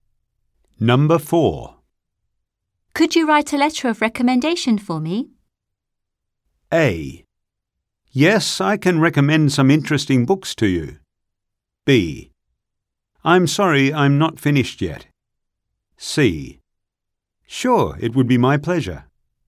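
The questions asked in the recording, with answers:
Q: Could you write a letter of recommendation for me?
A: C: Sure, it would be my pleasure.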